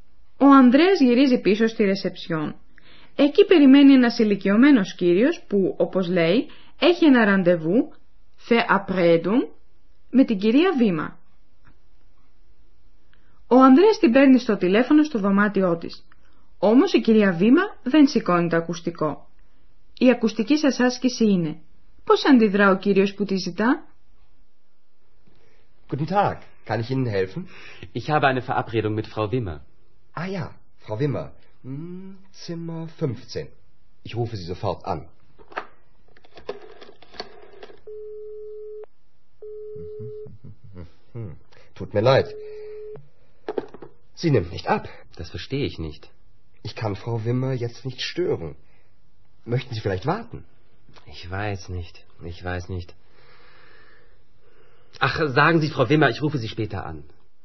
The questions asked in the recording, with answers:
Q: Πώς αντιδρά ο κύριος που τη ζητά?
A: Ο κύριος παρακαλεί να διαβιβαστεί στην κυρία Βήμα πώς θα της τηλεφωνήσει αργότερα.